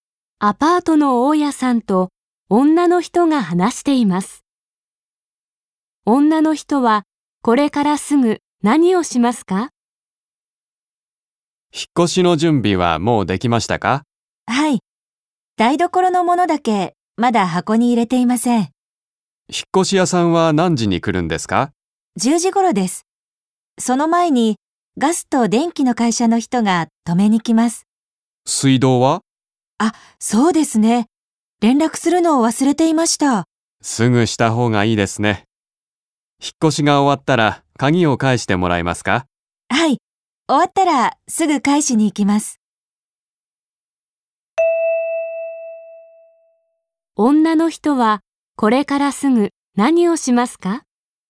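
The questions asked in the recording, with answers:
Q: 女の人はこれからすぐ何をしますか?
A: 水道の会社に連絡する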